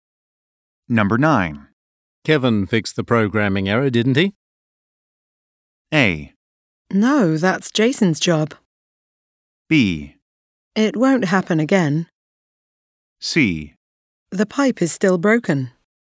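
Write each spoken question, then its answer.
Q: Kevin fixed the programming error, didn't he?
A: A: No, that's Jason's job.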